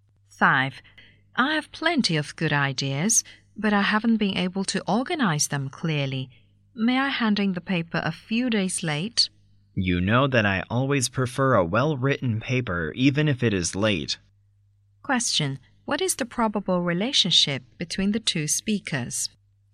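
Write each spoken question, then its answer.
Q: What is the probable relationship between the two speakers?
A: Student and teacher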